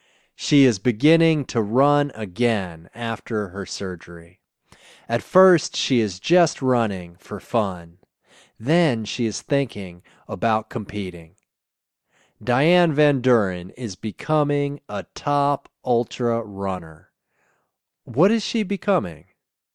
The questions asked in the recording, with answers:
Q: What is she becoming?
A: She is becoming a top ultra runner.